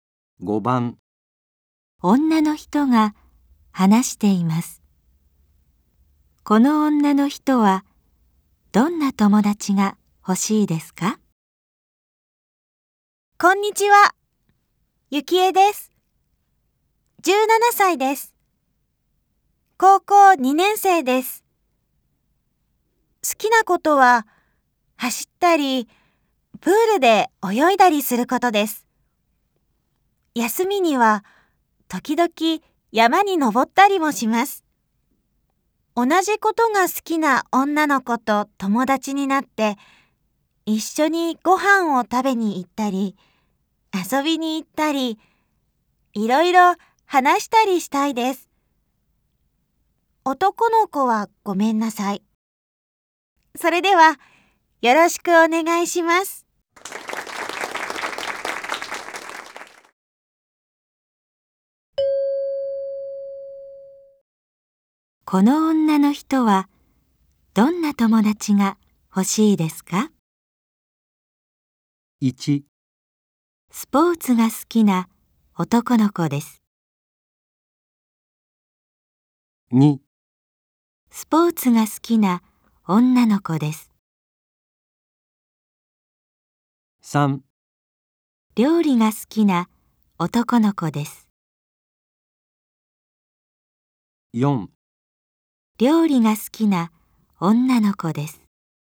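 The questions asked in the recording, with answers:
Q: この女の人はどんな友達が欲しいですか?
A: 2: スポーツが好きな女の子です。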